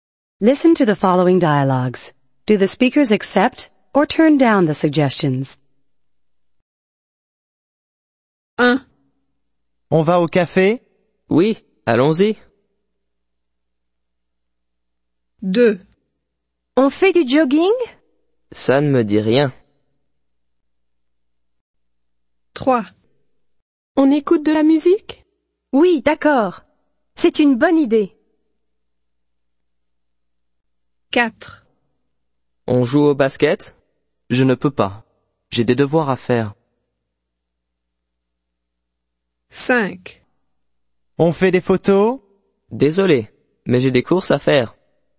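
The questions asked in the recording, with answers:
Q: Do the speakers accept or turn down the suggestions?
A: accept

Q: Do the speakers accept or turn down the suggestions?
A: turn down

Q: Do the speakers accept or turn down the suggestions?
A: accept

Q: Do the speakers accept or turn down the suggestions?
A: turn down

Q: Do the speakers accept or turn down the suggestions?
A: turn down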